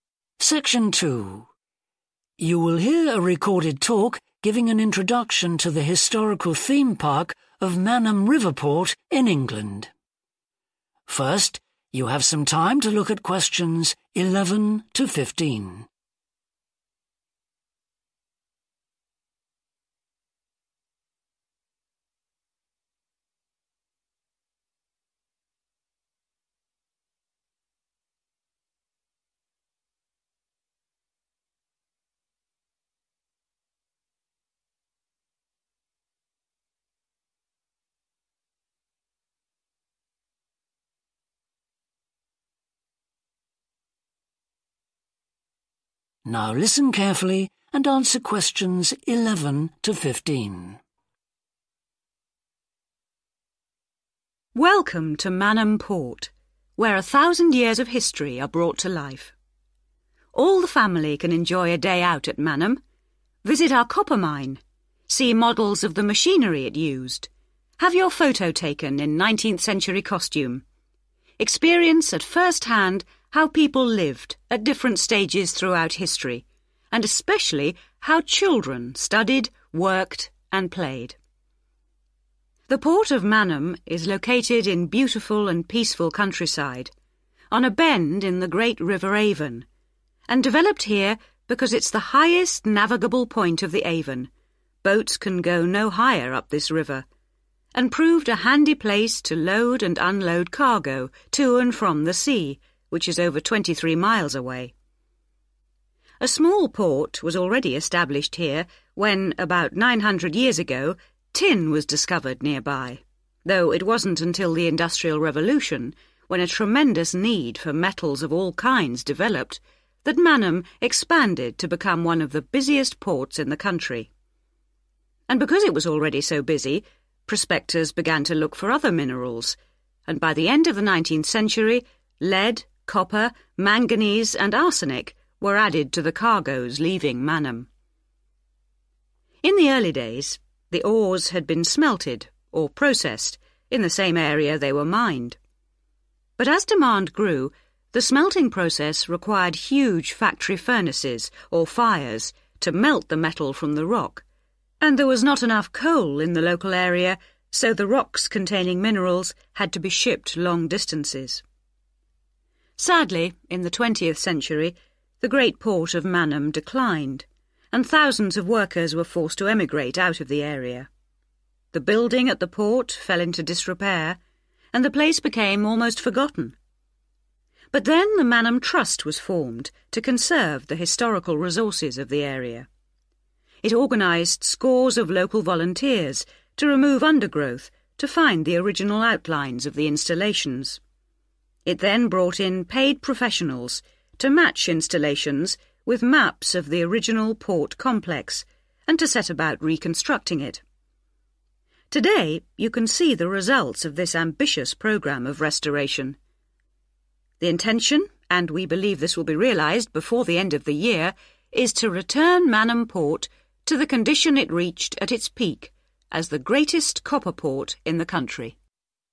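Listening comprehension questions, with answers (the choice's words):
Choose the correct letter, A, B or C.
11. Why did a port originally develop at Manham?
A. It was safe from enemy attack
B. It was convenient for river transport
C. It had a good position on the sea coast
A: It was convenient for river transport

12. What caused Manham's sudden expansion during the Industrial Revolution?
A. the improvement in mining techniques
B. the increase in demand for metals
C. the discovery of tin in the area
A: the increase in demand for metals

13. Why did rocks have to be sent away from Manham to be processed?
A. shortage of fuel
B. poor transport systems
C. lack of skills among local people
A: shortage of fuel

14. What happened when the port declined in the twentieth century?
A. The workers went away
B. Traditional skills were lost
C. Buildings were used for new purposes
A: The workers went away

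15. What did the Manham Trust hope to do?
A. discover the location of the original port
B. provide jobs for the unemployed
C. rebuild the port complex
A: rebuild the port complex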